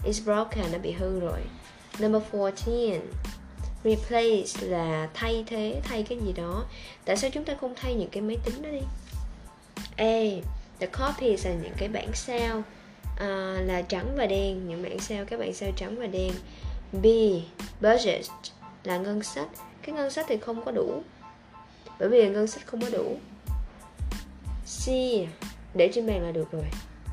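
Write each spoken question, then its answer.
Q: Tại sao chúng ta không thay những cái máy tính đó đi?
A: B: Ngân sách không có đủ.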